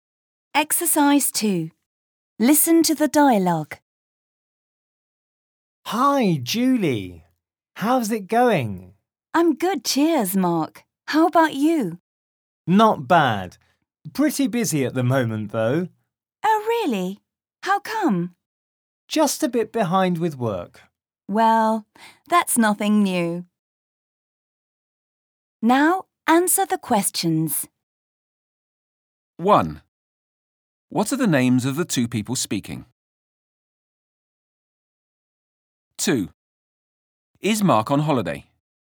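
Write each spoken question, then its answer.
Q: What are the names of the two people speaking?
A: Julie and Mark

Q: Is Mark on holiday?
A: No, he is busy and behind with work.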